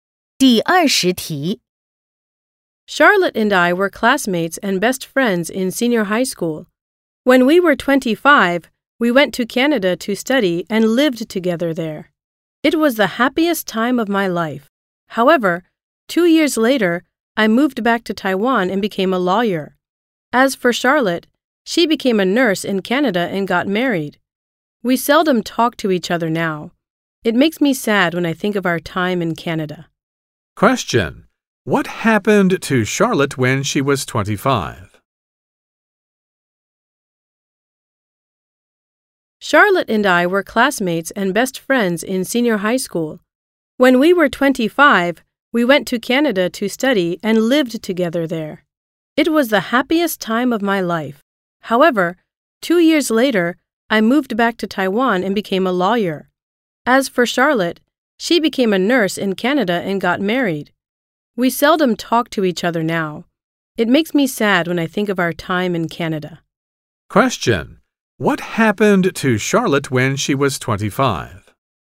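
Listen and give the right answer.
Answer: She went to Canada to study and lived with the speaker.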